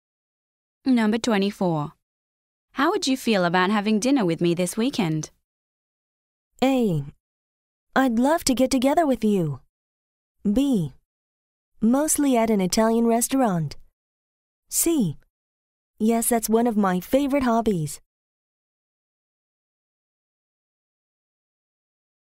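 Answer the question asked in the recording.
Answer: A: I'd love to get together with you.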